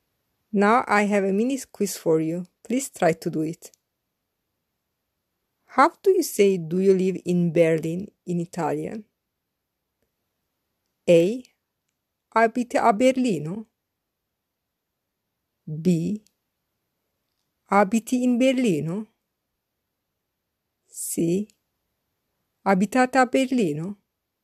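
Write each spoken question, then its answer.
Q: How do you say do you live in Berlin in Italian?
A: C: Abitate a Berlino?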